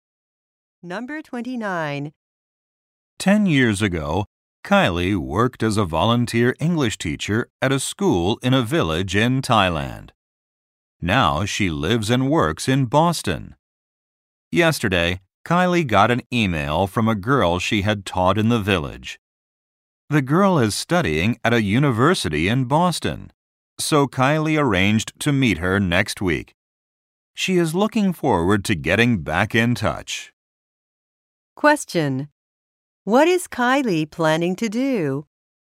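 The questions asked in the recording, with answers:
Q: What is Kylie planning to do?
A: Meet a girl she taught in Thailand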